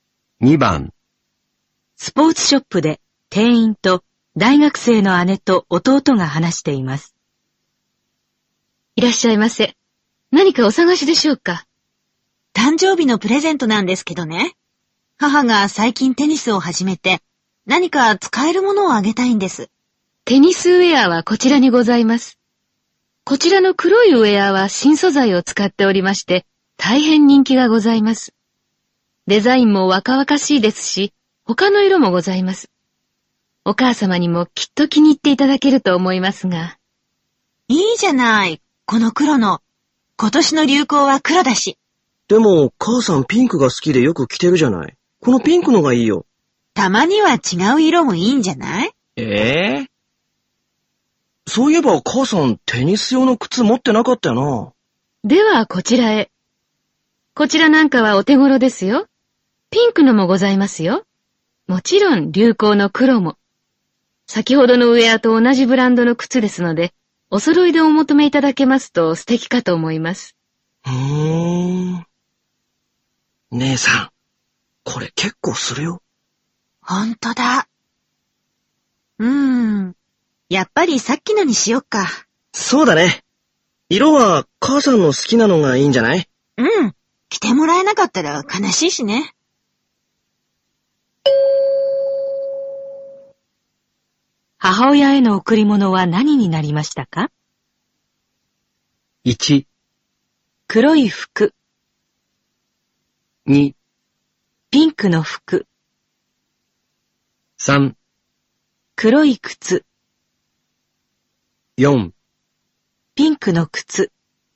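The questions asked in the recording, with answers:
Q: 母親への贈り物は何になりましたか?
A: 2: ピンクの服。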